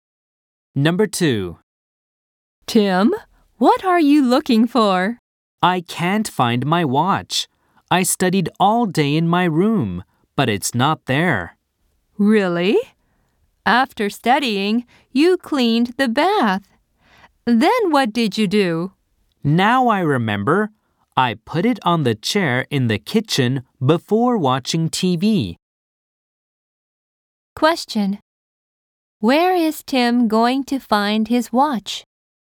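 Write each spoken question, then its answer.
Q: Where is Tim going to find his watch?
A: On the chair in the kitchen.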